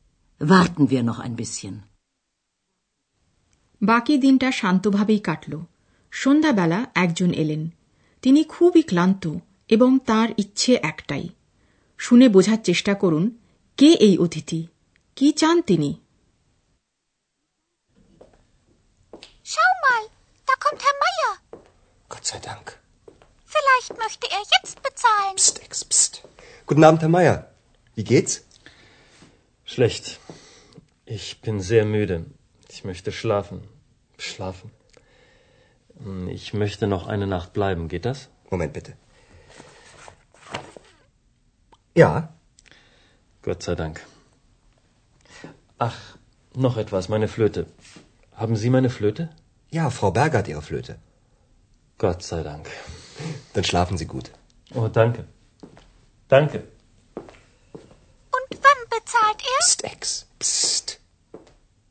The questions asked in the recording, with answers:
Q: কে এই অতিথি কি চান তিনি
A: হ্যাঁ সত্যিই উনি হলেন হ্যার মায়ার ফিরে এসেছেন প্রথমেই তিনি তার একটি ইচ্ছার কথা জানালেন ঘুমানোর ইচ্ছা